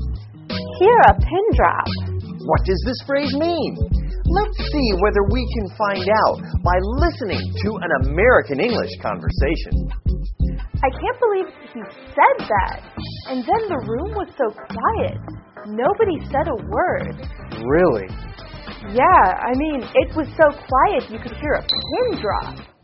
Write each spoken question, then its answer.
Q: What does this phrase mean?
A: So, when you say you can hear a pin drop, it means that the room is silent.